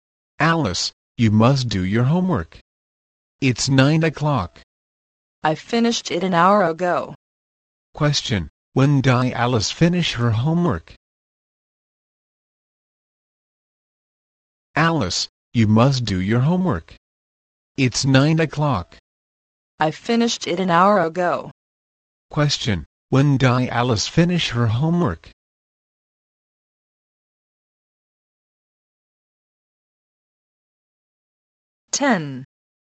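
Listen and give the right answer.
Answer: At 8 o'clock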